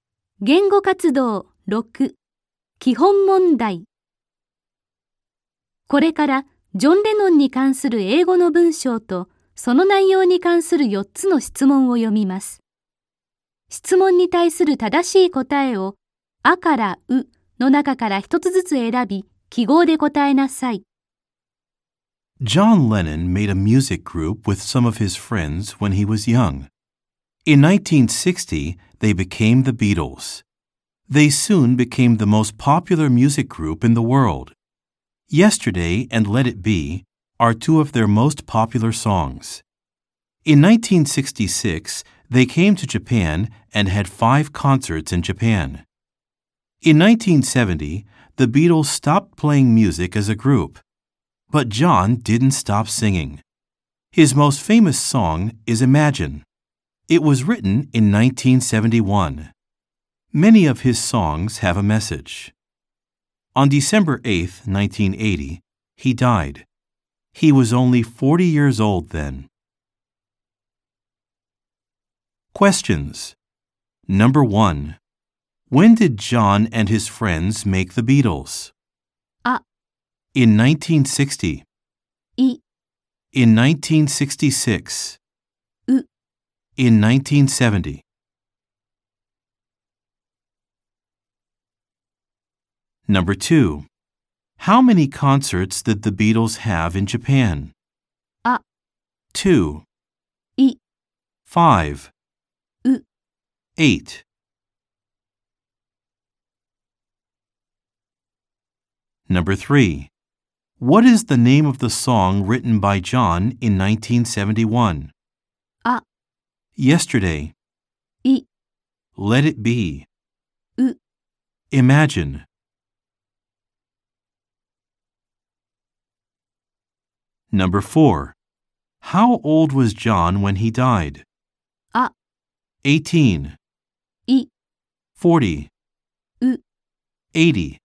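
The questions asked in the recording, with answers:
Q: How old was John when he died?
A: B: 40.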